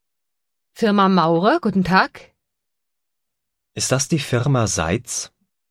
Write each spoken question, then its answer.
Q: Ist das die Firma Seitz?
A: Nein, hier Maurer.